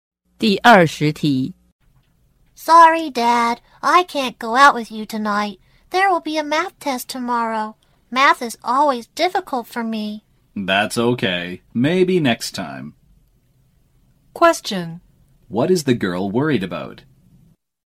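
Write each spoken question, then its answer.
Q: What is the girl worried about?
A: Tomorrow's math test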